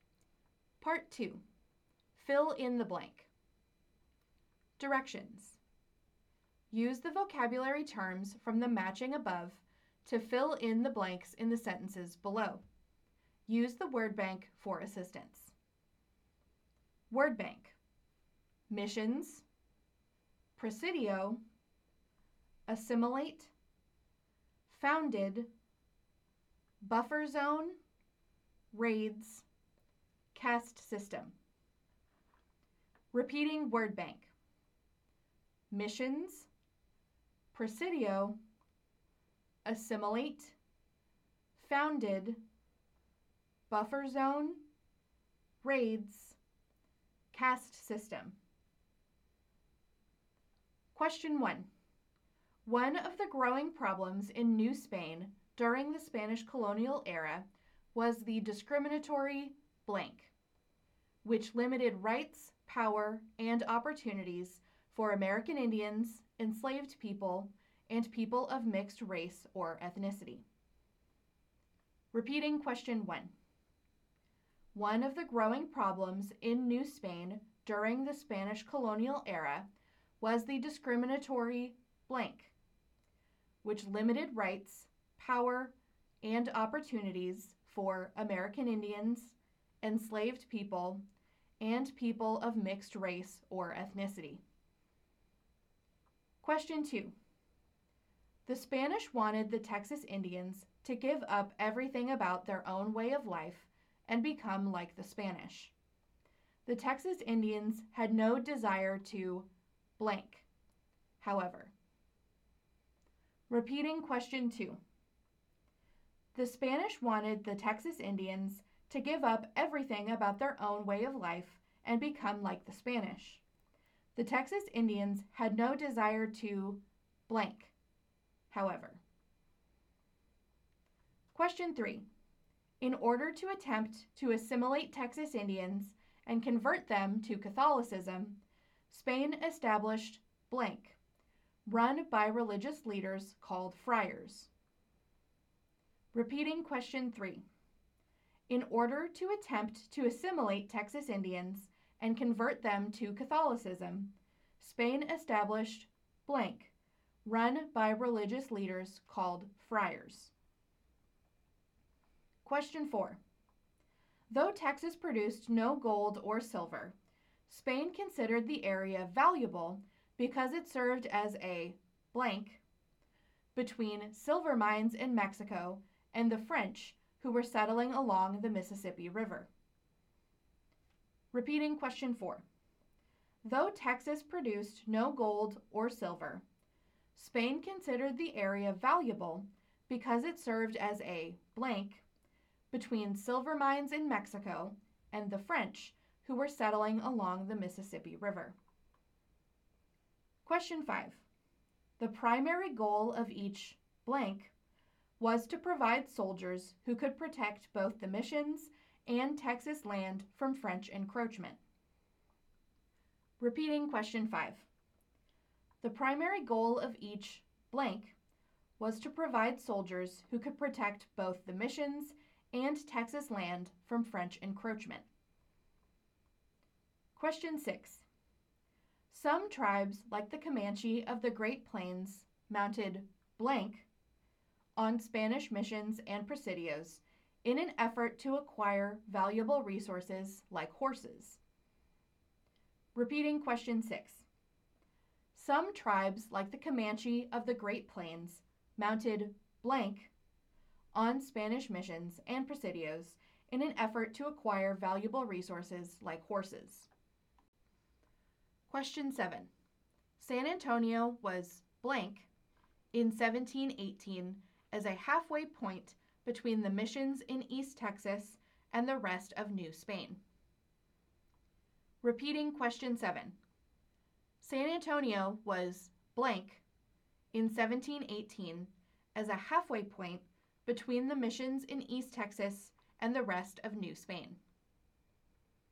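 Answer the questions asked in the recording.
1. caste system
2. assimilate
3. missions
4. buffer zone
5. presidio
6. raids
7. founded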